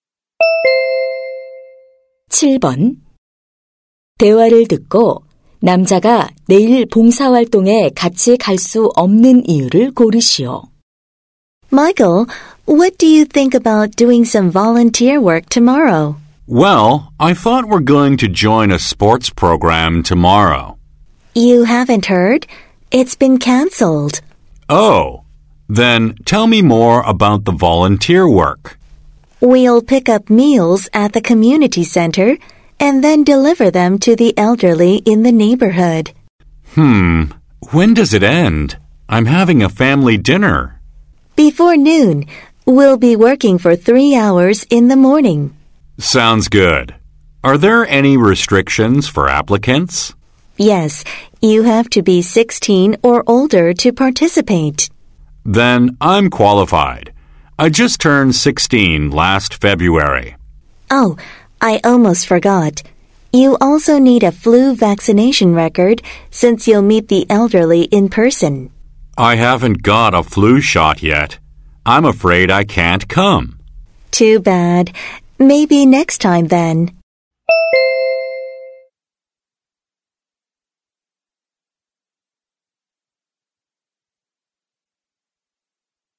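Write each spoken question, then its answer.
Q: 대화를 듣고 남자가 내일 봉사활동에 같이 갈 수 없는 이유를 고르시오.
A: 독감 예방 접종을 아직 맞지 않아서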